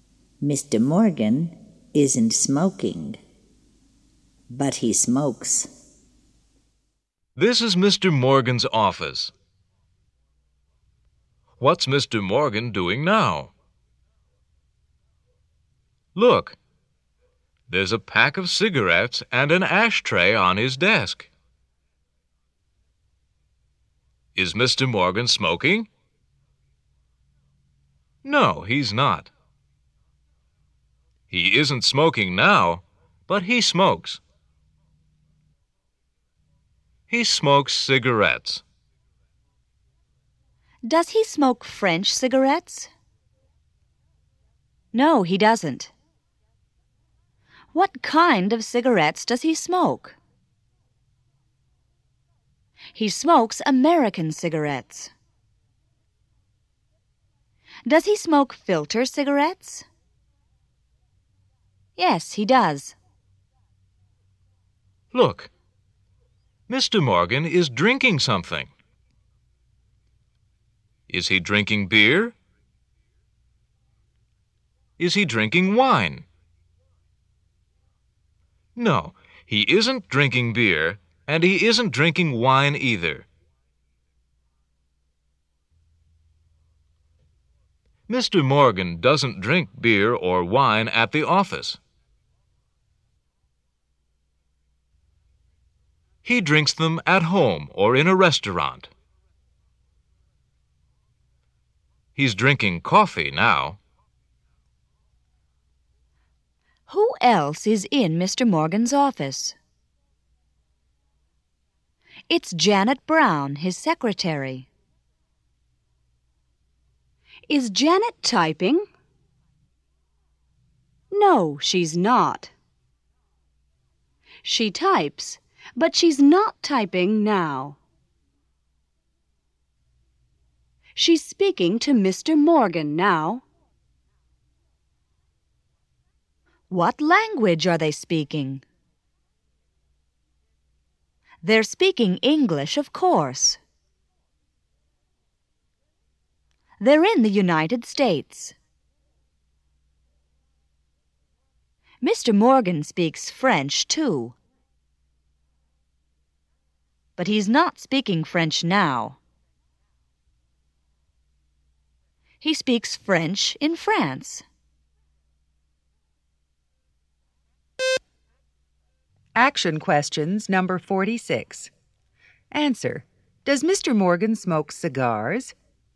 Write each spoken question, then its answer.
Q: Does Mr. Morgan smoke cigars?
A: No, he doesn't.